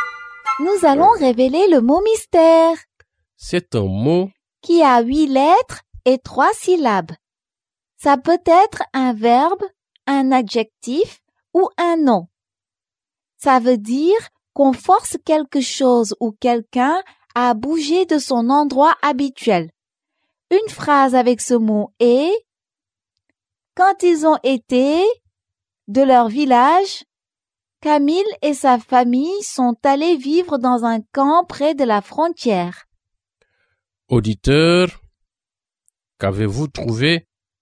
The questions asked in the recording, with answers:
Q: Auditeur, qu'avez-vous trouvé?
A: Le mot mystère est déplacé.